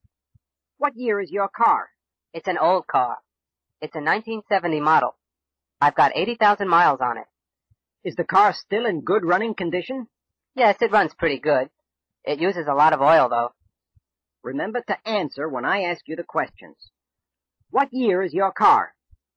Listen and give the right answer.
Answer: It's a 1970 model.